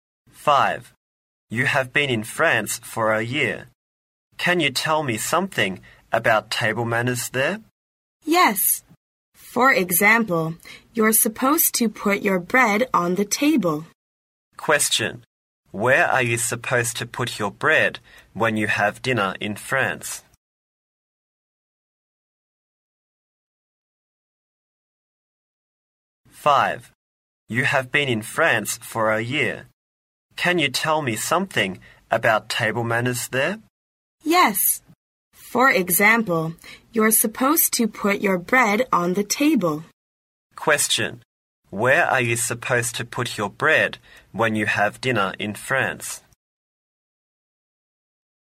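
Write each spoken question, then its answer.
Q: Question. Where are you supposed to put your bread when you have dinner in France?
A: On the table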